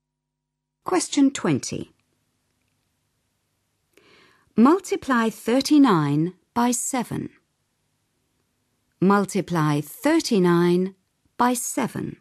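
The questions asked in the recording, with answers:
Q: Multiply 39 by 7.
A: 273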